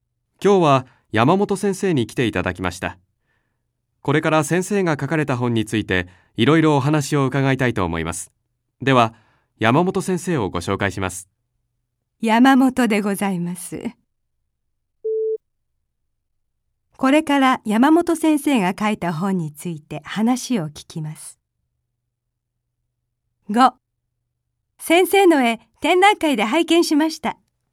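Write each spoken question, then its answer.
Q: これから山本先生が書いた本について話を聞きます。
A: ○(正しい)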